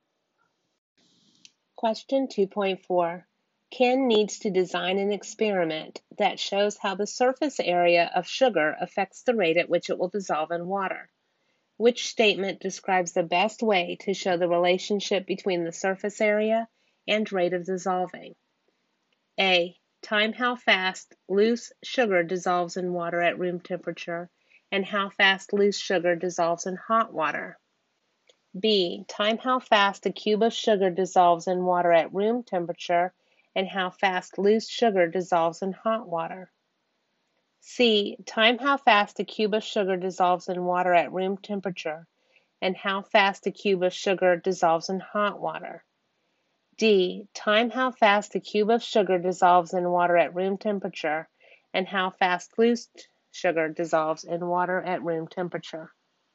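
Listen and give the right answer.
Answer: D: Time how fast a cube of sugar dissolves in water at room temperature and how fast loose sugar dissolves in water at room temperature.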